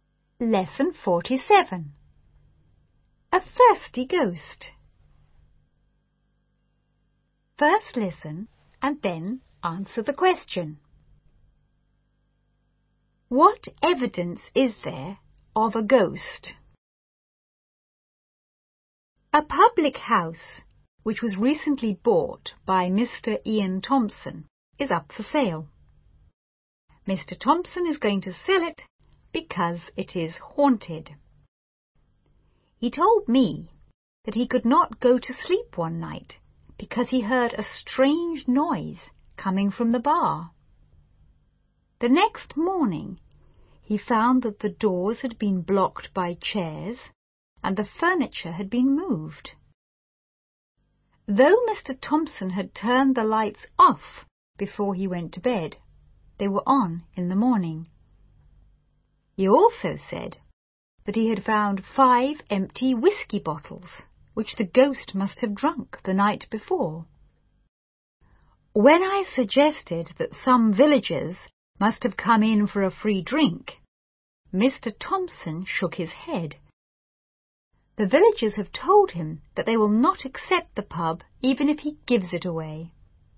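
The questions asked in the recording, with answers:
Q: What evidence is there of a ghost?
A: Strange noises from the bar, doors blocked by chairs, furniture moved, lights turned on, and five empty whisky bottles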